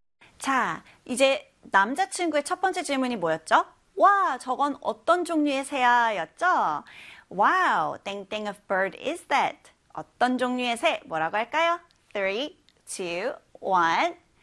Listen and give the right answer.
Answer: what kind라고 해야 되겠죠?